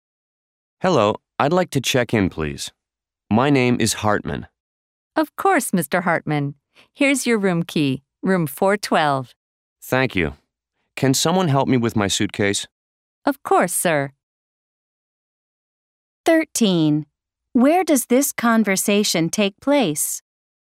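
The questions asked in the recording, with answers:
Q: Where does this conversation take place?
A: At a hotel (front desk)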